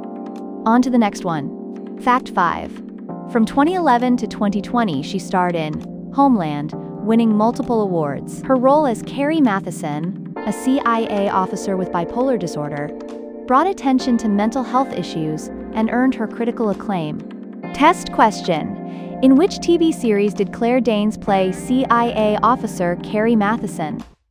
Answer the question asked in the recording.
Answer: Homeland.